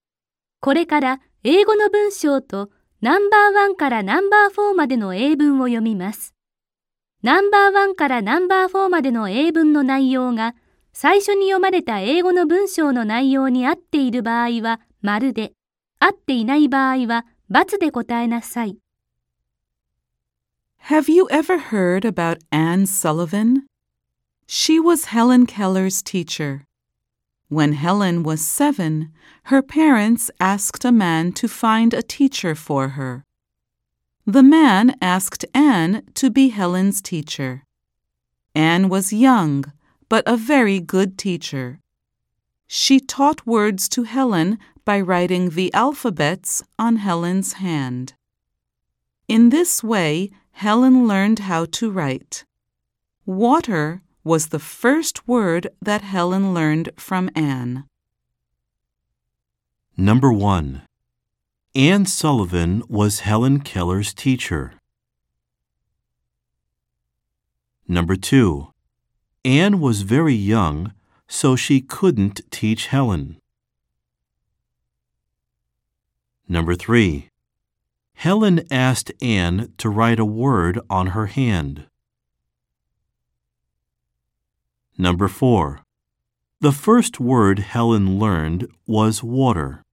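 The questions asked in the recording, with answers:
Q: Anne Sullivan was Helen Keller's teacher.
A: ○ (true)

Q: Anne was very young, so she couldn't teach Helen.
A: × (false)

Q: Helen asked Anne to write a word on her hand.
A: × (false)

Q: The first word Helen learned was water.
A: ○ (true)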